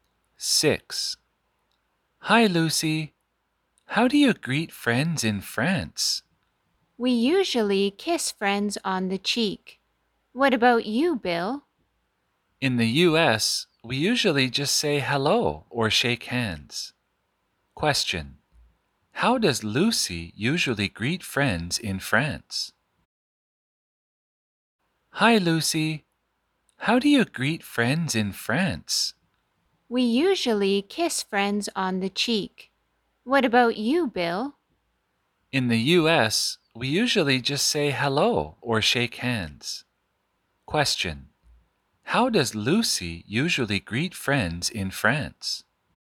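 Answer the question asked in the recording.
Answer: She kisses friends on the cheek.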